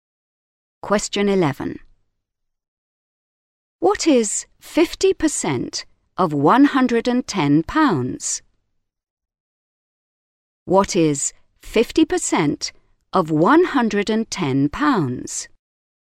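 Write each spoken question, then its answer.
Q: What is 50% of £110?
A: £55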